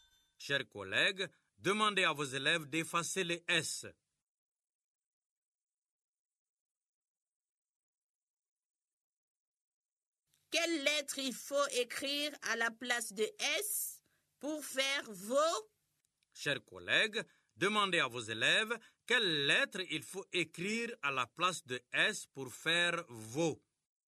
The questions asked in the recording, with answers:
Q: Quelle lettre il faut écrire à la place de S pour faire vos?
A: Grand-mère, c'est V.